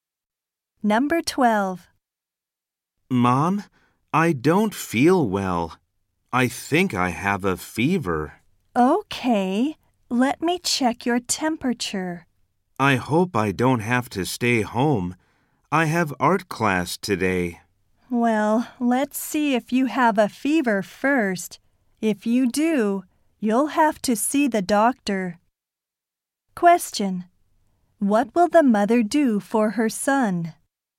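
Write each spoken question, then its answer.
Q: What will the mother do for her son?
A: Check his temperature.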